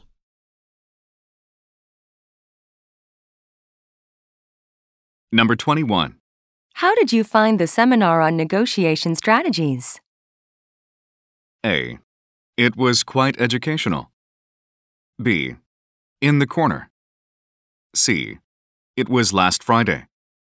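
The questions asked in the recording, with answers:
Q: How did you find the seminar on negotiation strategies?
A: A: It was quite educational.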